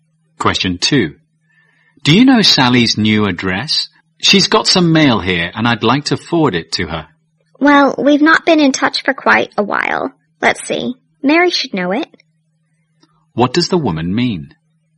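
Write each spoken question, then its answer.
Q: What does the woman mean?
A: She doesn't know Sally's address; Mary may know it.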